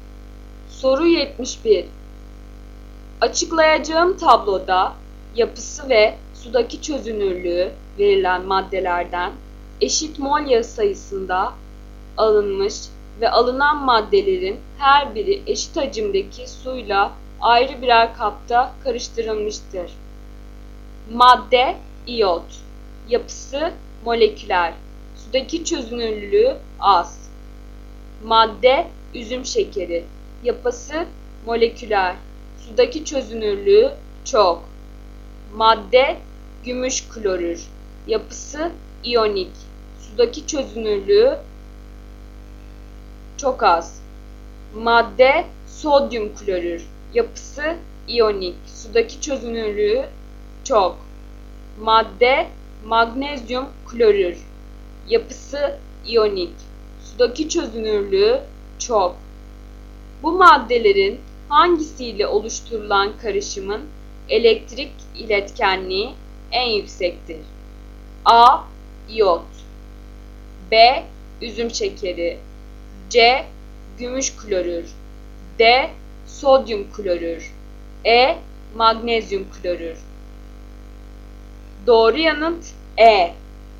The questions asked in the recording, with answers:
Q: Bu maddelerin hangisiyle oluşturulan karışımın elektrik iletkenliği en yüksektir?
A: Doğru yanıt E.